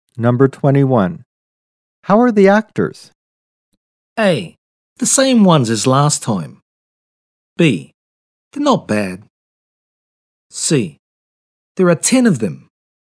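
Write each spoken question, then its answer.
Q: How are the actors?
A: B: They're not bad.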